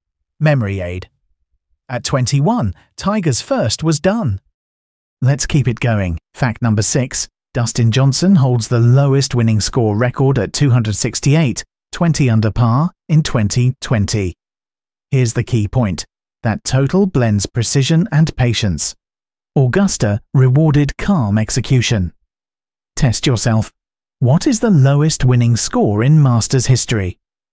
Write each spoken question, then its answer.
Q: What is the lowest winning score in Masters history?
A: Correct answer. 268.